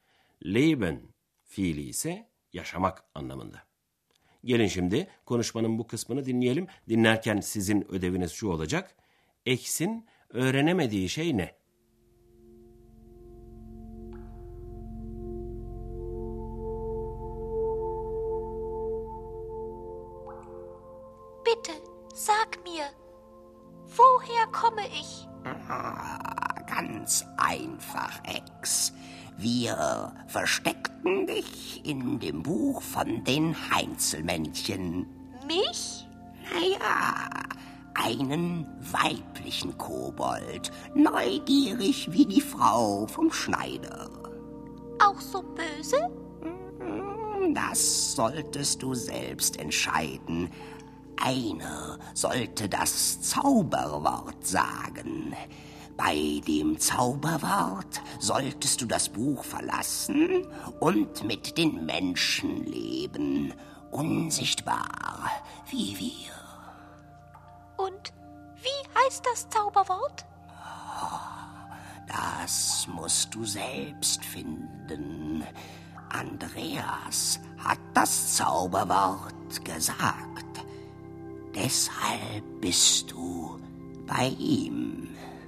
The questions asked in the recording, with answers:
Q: X'in öğrenemediği şey ne?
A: Ama X'in öğrenemediği şey, sihirli sözcüğün ne olduğuydu.